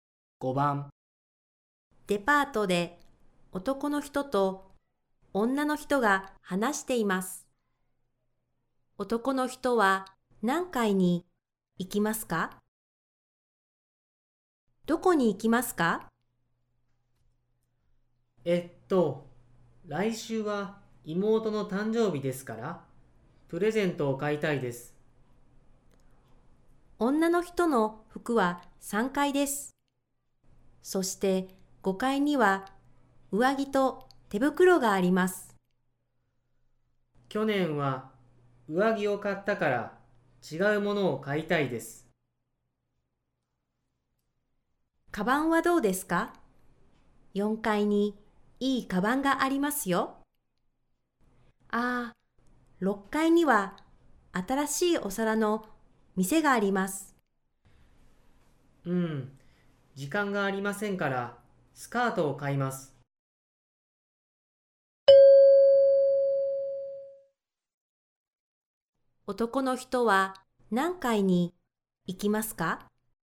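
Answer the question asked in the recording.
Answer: 3階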